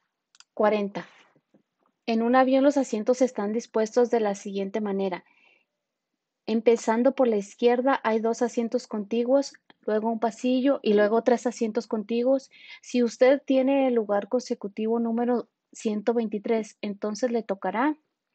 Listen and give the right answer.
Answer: Y la respuesta correcta es la A, pasillo lado derecho.